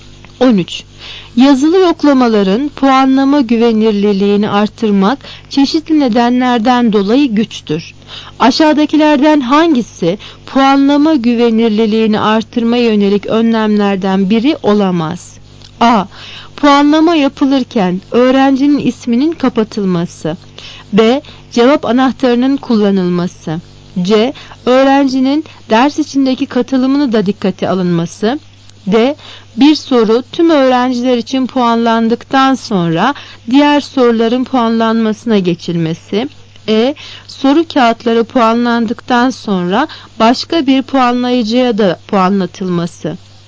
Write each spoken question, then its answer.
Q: Aşağıdakilerden hangisi puanlama güvenirliliğini artırma yönelik önlemlerden biri olamaz?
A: Cevap C. Öğrencinin ders içindeki katılımını da dikkate alınması.